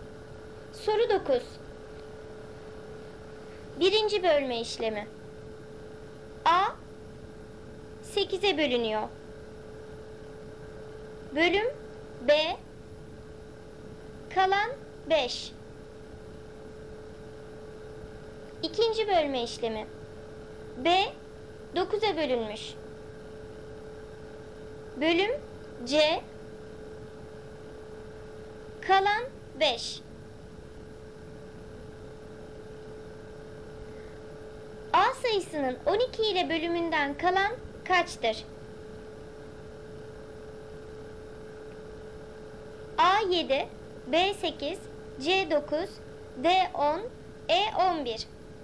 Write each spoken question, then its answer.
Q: A sayısının 12 ile bölümünden kalan kaçtır?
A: Doğru cevap C9.